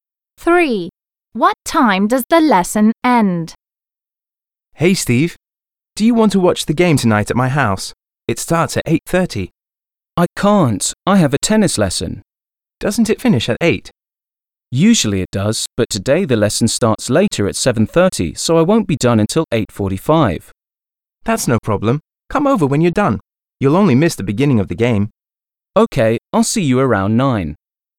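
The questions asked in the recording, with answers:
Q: What time does the lesson end?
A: 8:45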